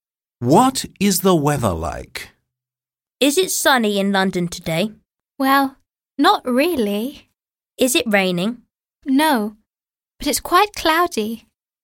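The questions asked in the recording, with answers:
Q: What is the weather like?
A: It's cloudy.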